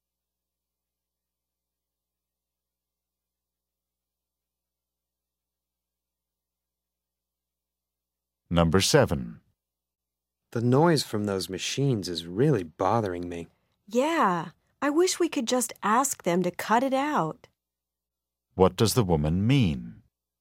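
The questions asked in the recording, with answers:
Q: What does the woman mean?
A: She wishes they could ask them to stop the noise.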